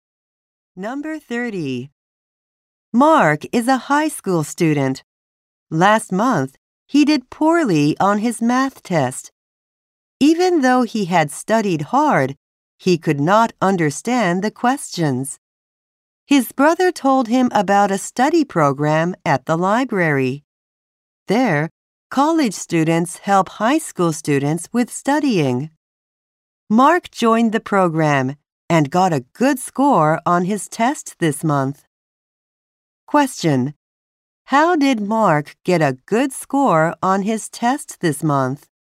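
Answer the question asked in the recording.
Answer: He joined a library study program where college students helped him.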